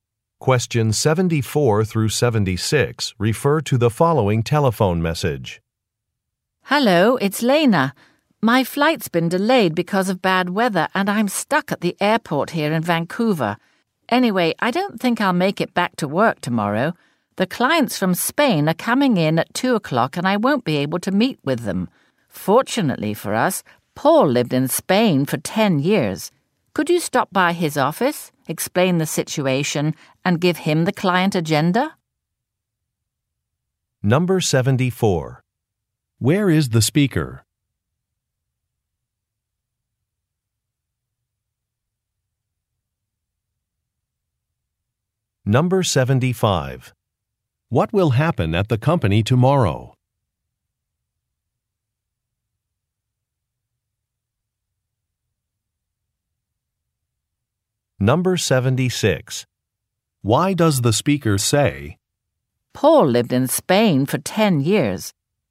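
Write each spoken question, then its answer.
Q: Where is the speaker?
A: At the airport in Vancouver

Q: What will happen at the company tomorrow?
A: Clients from Spain will come for a meeting at 2 o'clock

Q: Why does the speaker say, Paul lived in Spain for 10 years.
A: To suggest Paul could meet the Spanish clients instead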